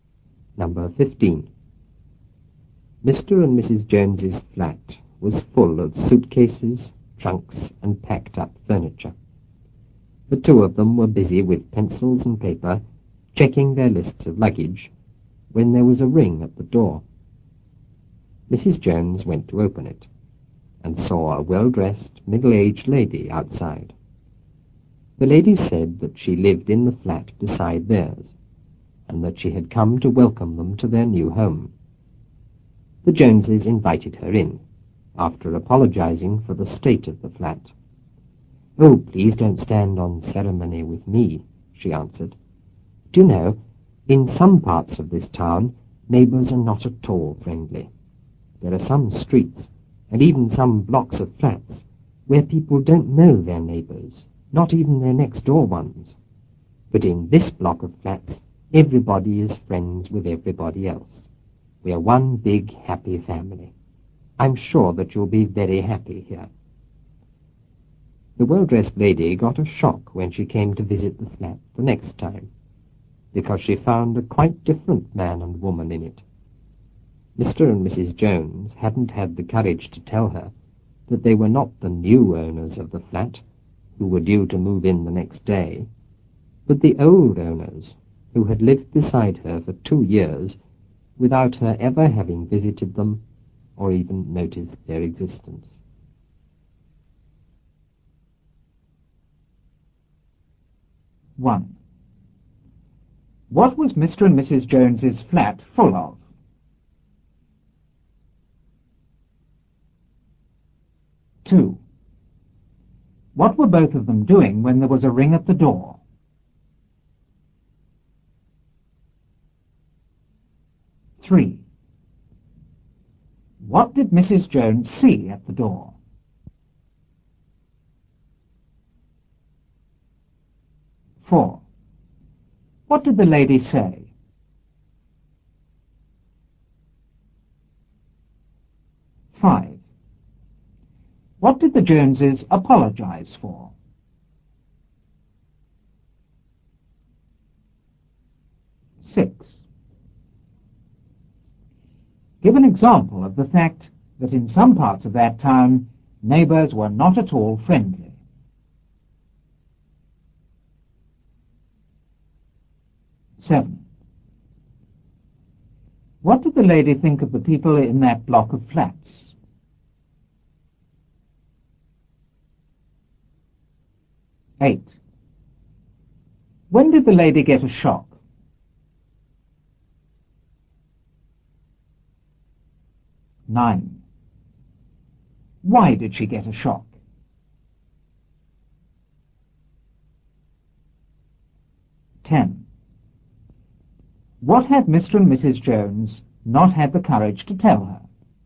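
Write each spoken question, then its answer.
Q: What was Mr. and Mrs. Jones's flat full of?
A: Suitcases, trunks, and packed-up furniture

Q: What were both of them doing when there was a ring at the door?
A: Checking their lists of luggage with pencils and paper

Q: What did Mrs. Jones see at the door?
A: A well-dressed, middle-aged lady

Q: What did the lady say?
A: That she lived in the flat beside theirs and had come to welcome them to their new home

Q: What did the Joneses apologize for?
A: The state of the flat

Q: Give an example of the fact that in some parts of that town, neighbors were not at all friendly.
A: In some streets and blocks of flats, people don't know even their next-door neighbors

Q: What did the lady think of the people in that block of flats?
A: Everybody was friends with everybody else, one big happy family

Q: When did the lady get a shock?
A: When she came to visit the flat the next time

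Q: Why did she get a shock?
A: She found a quite different man and woman in it

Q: What had Mr. and Mrs. Jones not had the courage to tell her?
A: That they were not the new owners but the old owners, who had lived beside her for 2 years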